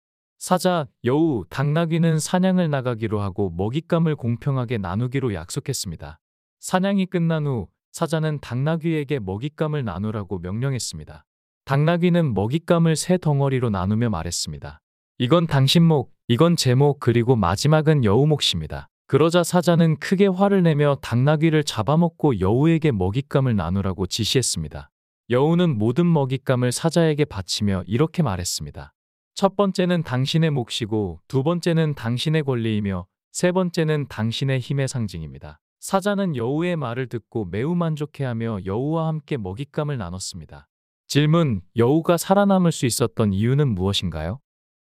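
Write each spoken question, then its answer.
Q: 여우가 살아남을 수 있었던 이유는 무엇인가요?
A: 당나귀가 죽는 것을 보고 모든 먹잇감을 사자에게 바쳤기 때문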